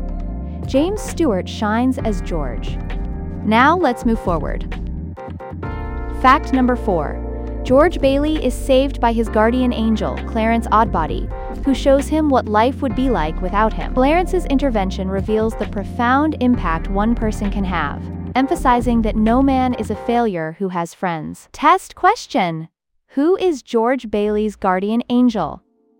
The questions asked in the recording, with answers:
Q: who is George Bailey's guardian angel?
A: Clarence Oddbody.